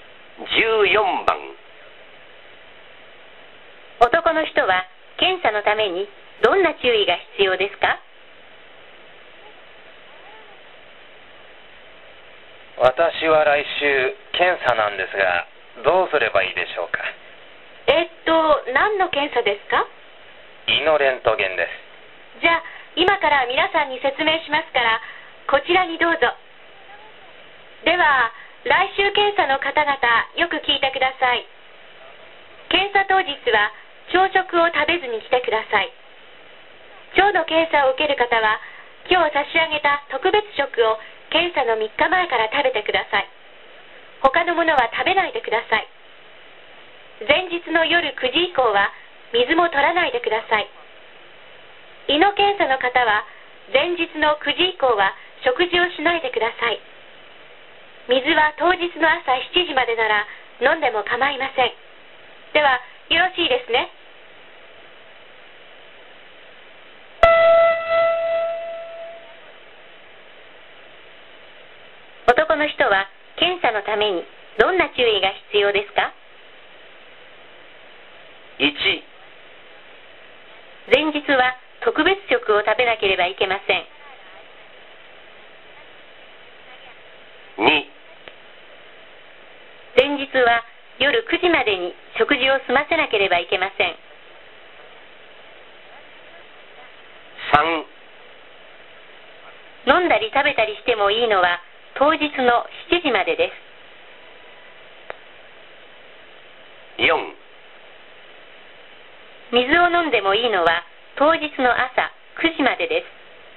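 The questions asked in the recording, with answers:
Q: 男の人は検査のためにどんな注意が必要ですか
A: 2: 前日は夜9時までに食事を済ませなければいけません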